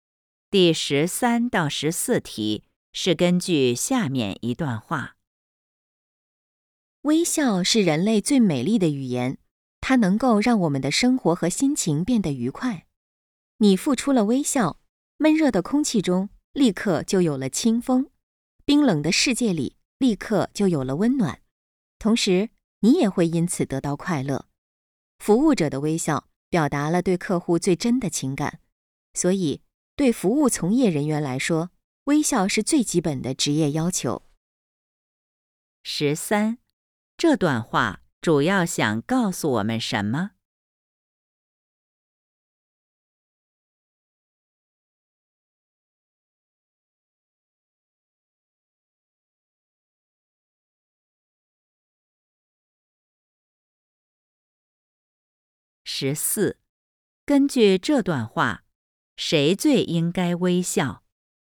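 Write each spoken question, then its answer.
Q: 这段话主要想告诉我们什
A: 微笑很重要,能让生活和心情愉快

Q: 根据这段话,谁最应该微笑?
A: 服务从业人员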